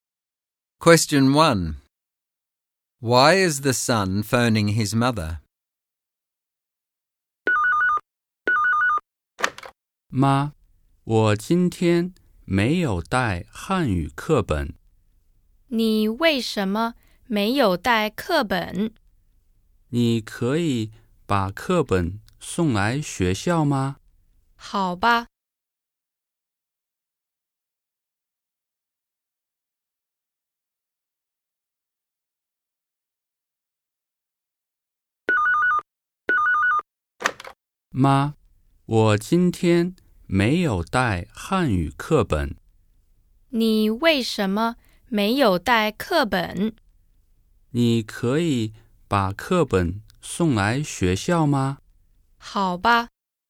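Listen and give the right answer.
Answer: He forgot his Chinese textbook and wants her to bring it to school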